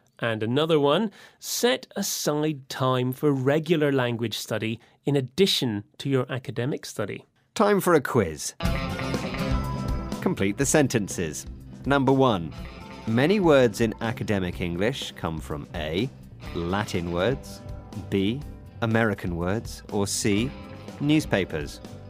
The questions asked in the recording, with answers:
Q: Number one, many words in academic English come from A, Latin words, B, American words, or C, newspapers.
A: It's A, Latin words.